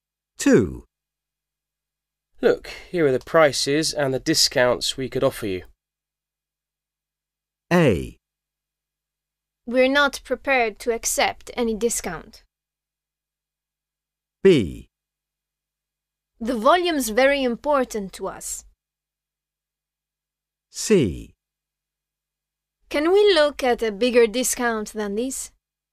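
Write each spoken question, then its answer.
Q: Look, here are the prices and the discounts we could offer you.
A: C: Can we look at a bigger discount than this?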